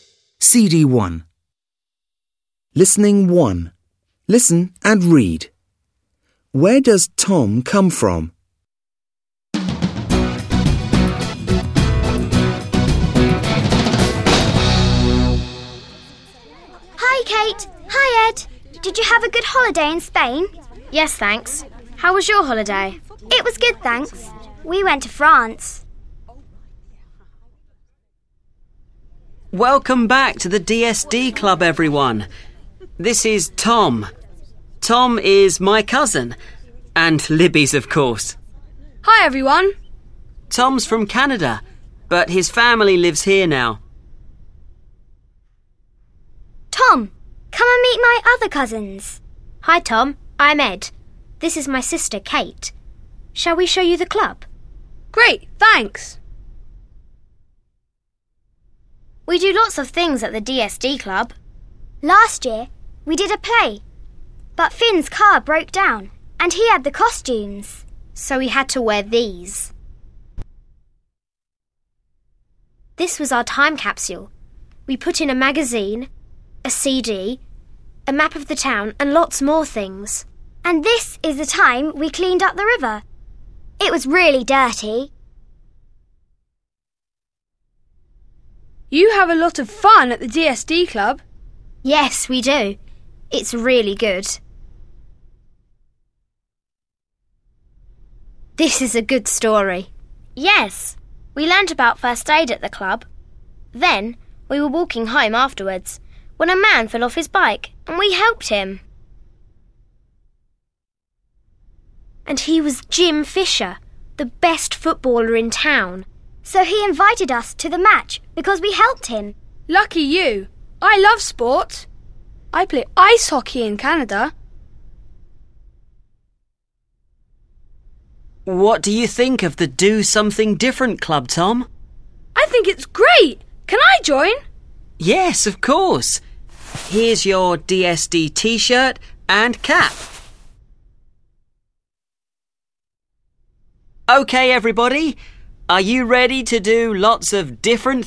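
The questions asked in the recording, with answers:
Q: Where does Tom come from?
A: Canada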